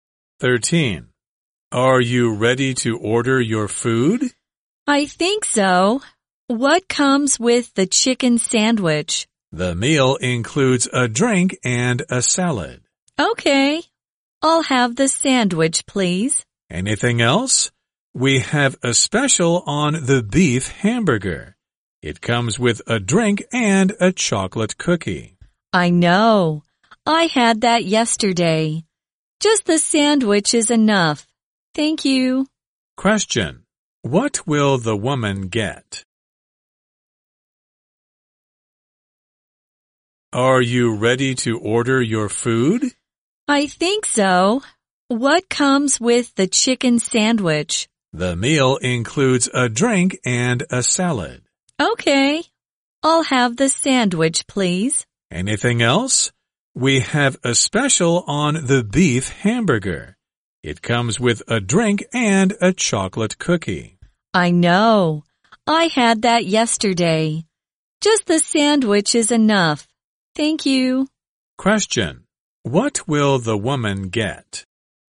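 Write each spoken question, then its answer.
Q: What will the woman get?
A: The chicken sandwich, with a drink and a salad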